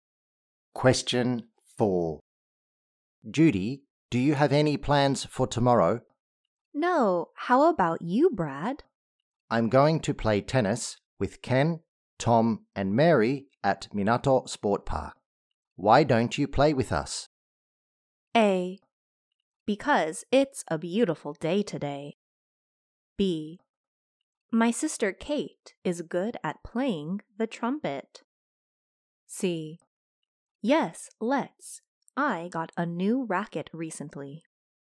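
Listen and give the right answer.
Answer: C: Yes, let's. I got a new racket recently.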